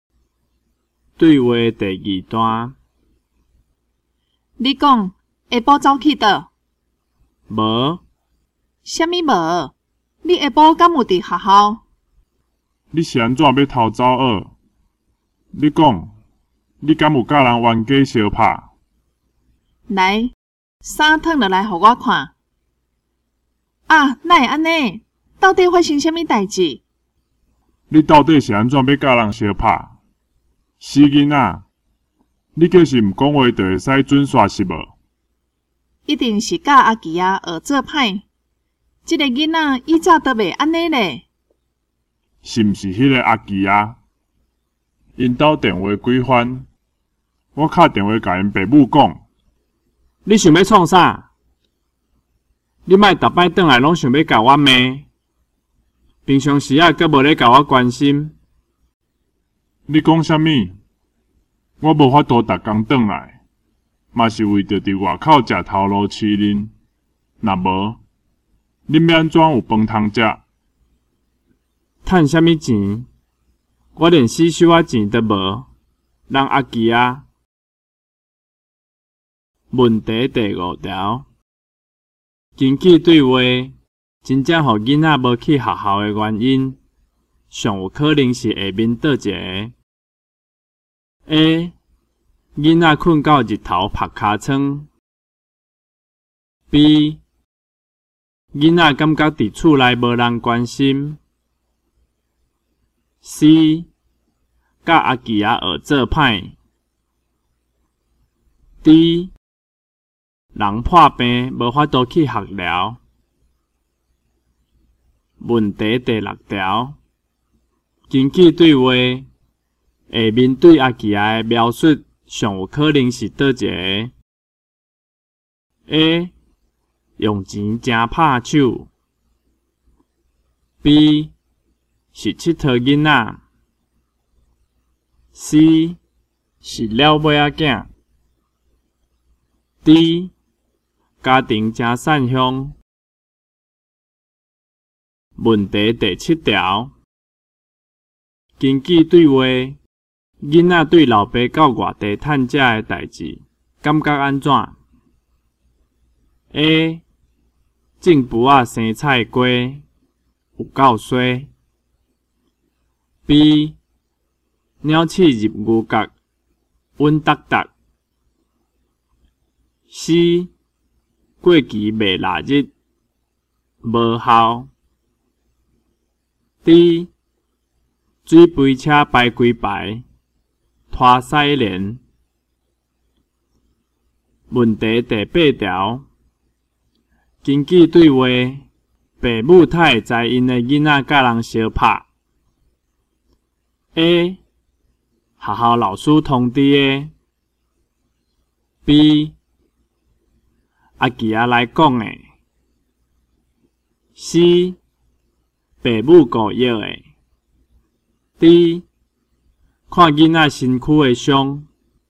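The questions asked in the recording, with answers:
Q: 根据对话,真正让囡仔无去学校的原因,上有可能是下面倒一个。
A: B: 囡仔感觉伫厝内无人关心。

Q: 根据对话,父母太知因的囡仔甲人相拍。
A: D: 看囡仔身躯的伤。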